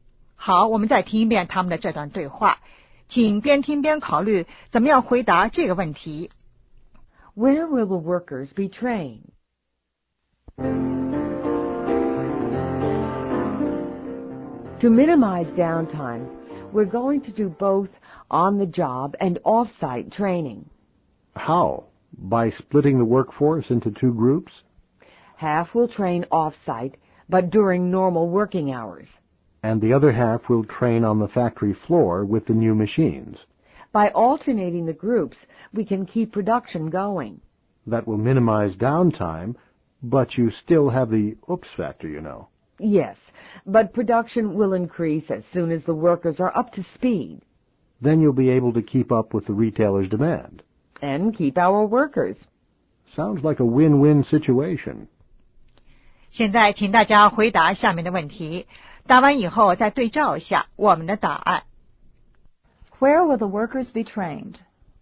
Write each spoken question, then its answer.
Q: Where will the workers be trained?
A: Both on the job and off-site.